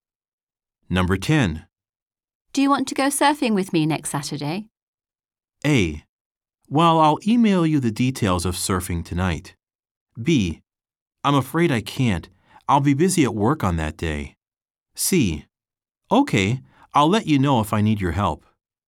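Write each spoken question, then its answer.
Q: Do you want to go surfing with me next Saturday?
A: B: I'm afraid I can't. I'll be busy at work on that day.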